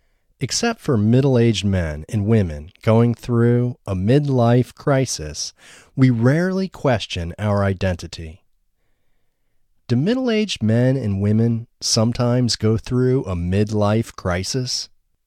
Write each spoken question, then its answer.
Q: Do middle-aged men and women sometimes go through a midlife crisis?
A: Yes, middle-aged men and women sometimes go through a midlife crisis.